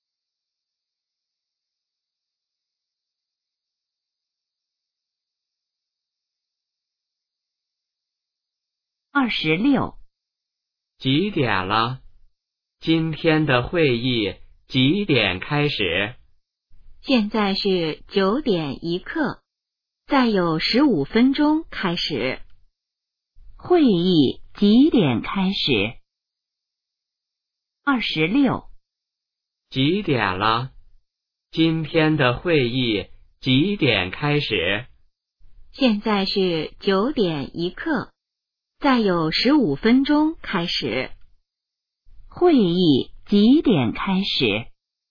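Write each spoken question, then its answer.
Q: 会议几点开始?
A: 9:16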